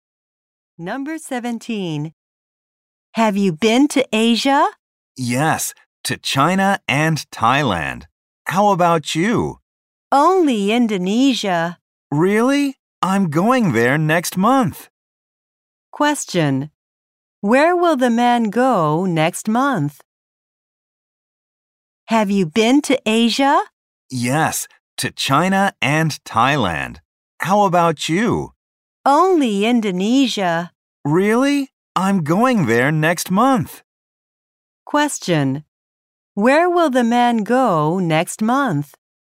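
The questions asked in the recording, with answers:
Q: Question. Where will the man go next month?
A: Indonesia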